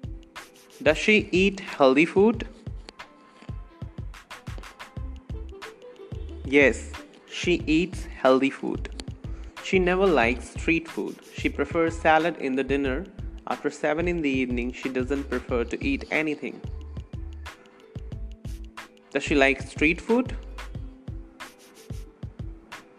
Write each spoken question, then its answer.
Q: Does she like street food?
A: No, she doesn't like street food.